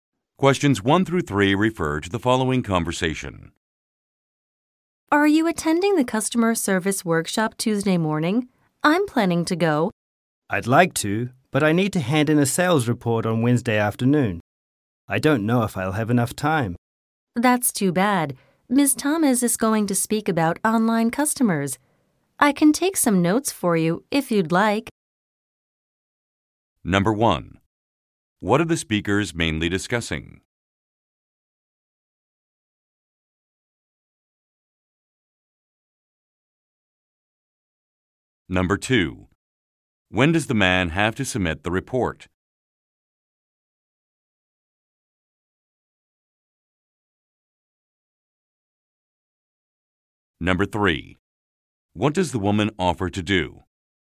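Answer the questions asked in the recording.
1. A customer service workshop
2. Wednesday afternoon
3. Take some notes for him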